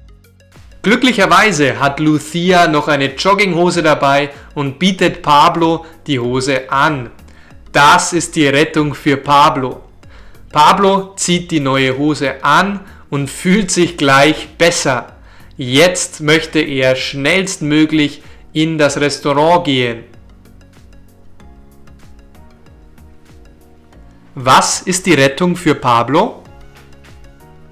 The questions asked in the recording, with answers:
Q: Was ist die Rettung für Pablo?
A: Lucia hat noch eine Jogginghose dabei und bietet Pablo die Hose an.